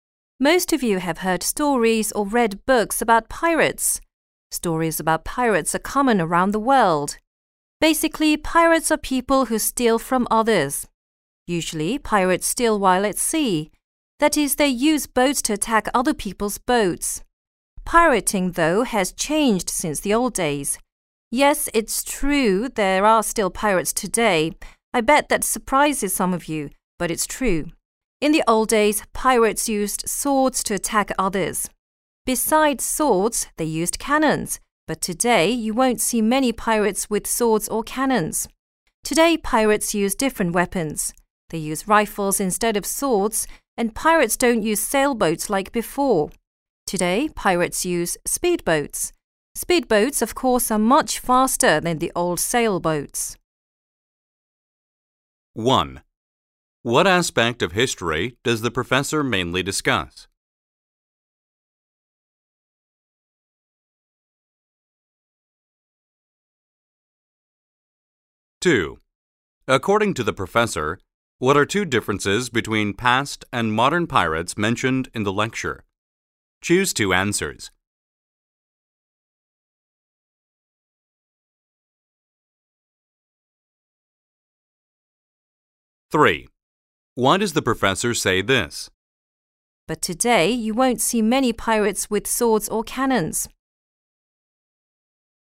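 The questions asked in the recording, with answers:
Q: What aspect of history does the professor mainly discuss?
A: Pirates and how piracy has changed since the old days

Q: According to the professor, what are two differences between past and modern pirates mentioned in the lecture?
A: Modern pirates use rifles instead of swords and cannons, and speedboats instead of sailboats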